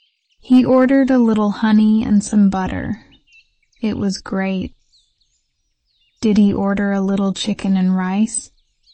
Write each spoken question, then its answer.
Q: Did he order a little chicken and rice?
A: No, he didn't.